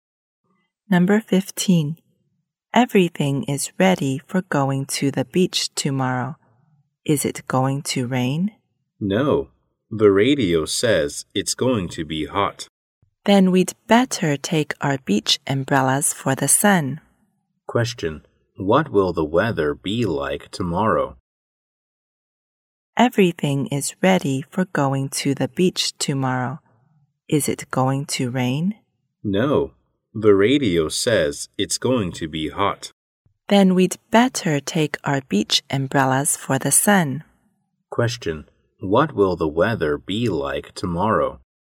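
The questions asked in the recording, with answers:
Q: What will the weather be like tomorrow?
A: Hot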